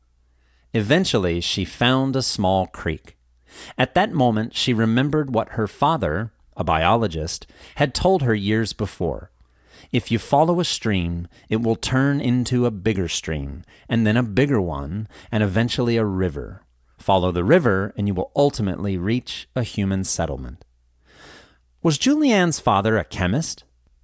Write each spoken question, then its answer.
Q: Was Julianne's father a chemist?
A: No, he wasn't. He was a biologist.